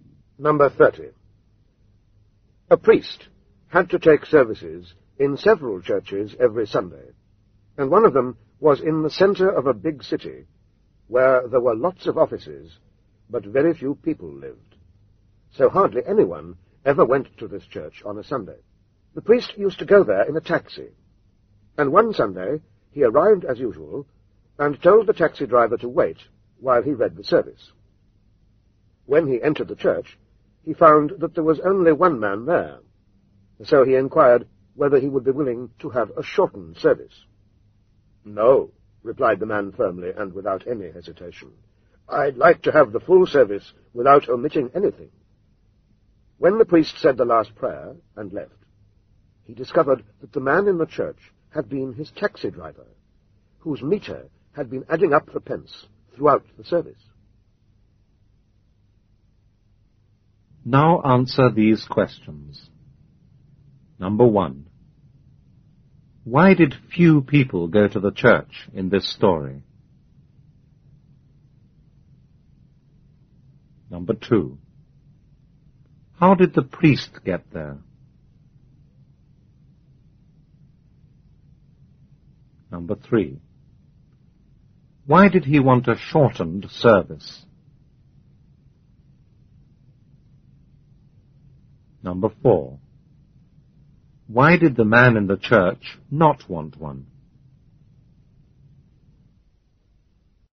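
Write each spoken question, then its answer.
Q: Why did few people go to the church in this story?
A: Because very few people lived in that part of the city; it was mostly offices.

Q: How did the priest get there?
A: By taxi.

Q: Why did he want a shortened service?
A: Because there was only one man in the church.

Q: Why did the man in the church not want one?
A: He was the taxi driver, and his meter was running up money the whole time the service lasted.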